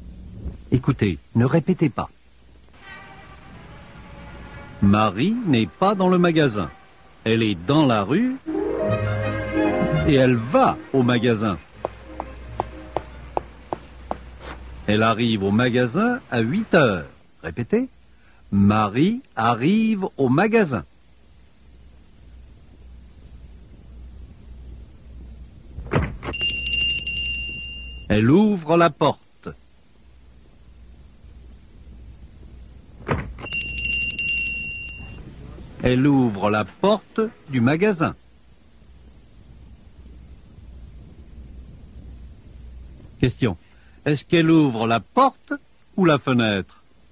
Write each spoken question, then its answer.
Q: Question. Est-ce qu'elle ouvre la porte ou la fenêtre?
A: Elle ouvre la porte.